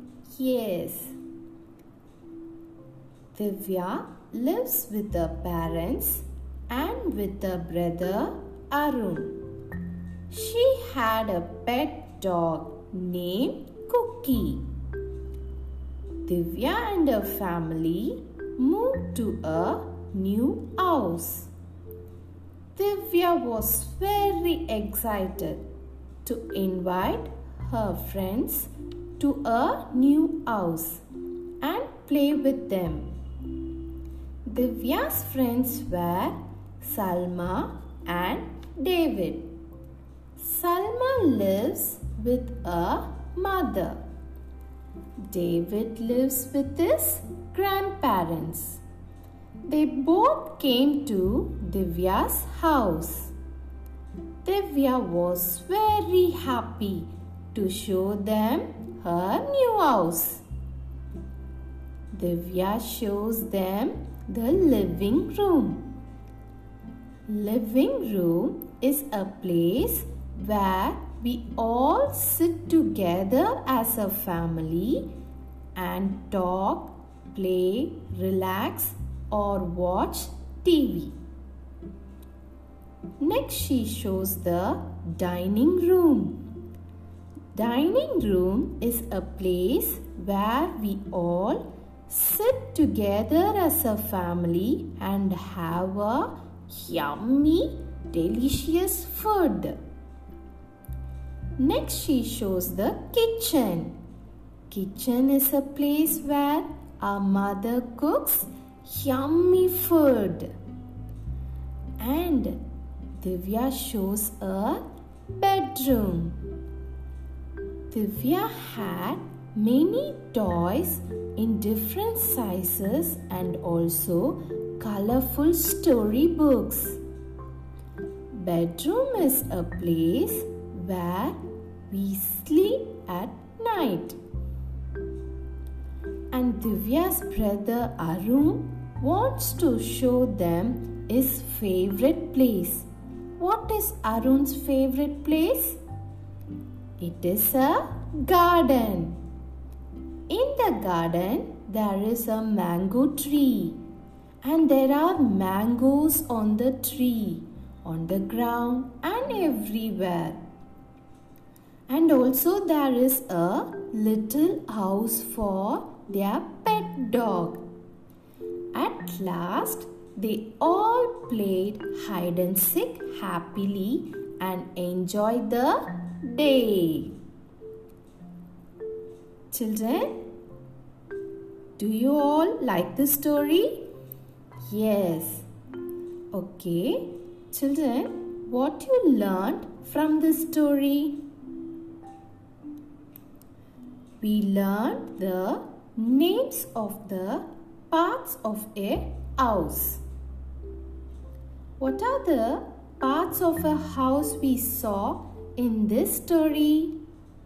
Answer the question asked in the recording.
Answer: Living room, dining room, kitchen, bedroom, and the garden.